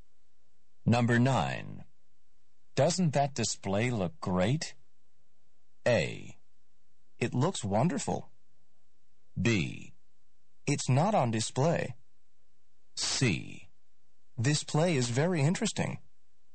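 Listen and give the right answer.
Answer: A: It looks wonderful.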